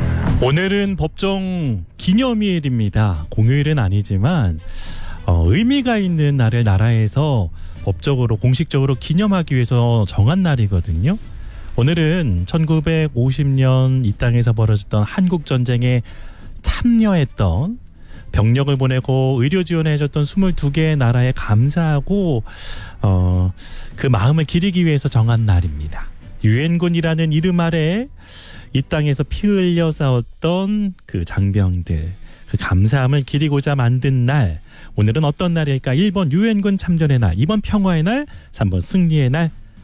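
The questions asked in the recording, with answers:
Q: 오늘은 어떤 날일까? 1번 유엔군 참전의 날, 2번 평화의 날, 3번 승리의 날.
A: 1번: 유엔군 참전의 날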